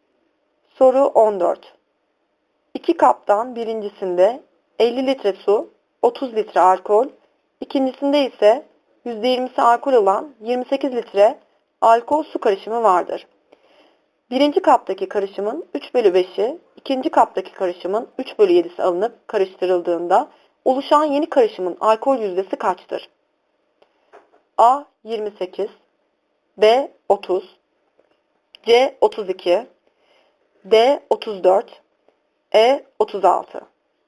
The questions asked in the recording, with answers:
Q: Birinci kaptaki karışımın 3 bölü 5'i, ikinci kaptaki karışımın 3 bölü 7'si alınıp karıştırıldığında oluşan yeni karışımın alkol yüzdesi kaçtır?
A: Doğru yanıt D 34.